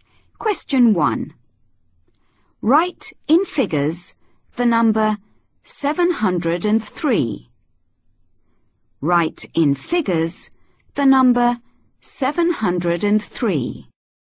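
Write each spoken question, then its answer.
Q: Write in figures the number 703.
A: 703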